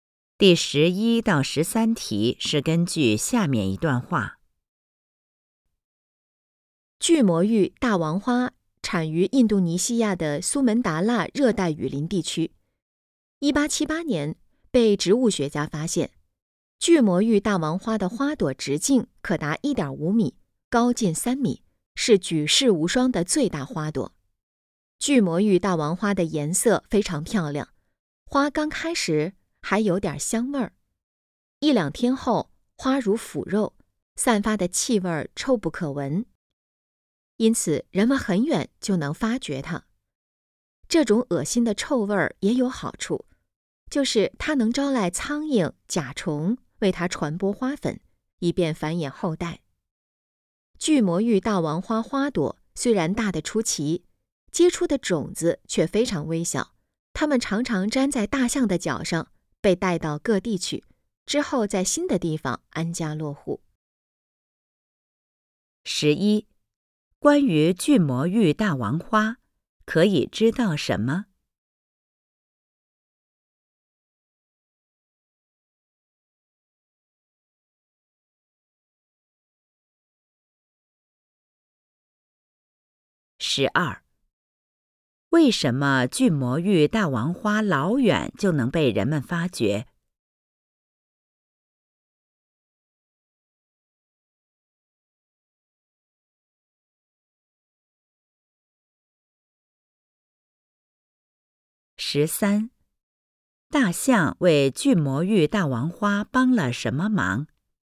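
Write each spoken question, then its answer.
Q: 为什么巨魔芋大王花老远就能被人们发觉?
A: 它散发的气味臭不可闻

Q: 大象为巨魔芋大王花帮了什么忙?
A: 把粘在脚上的种子带到各地去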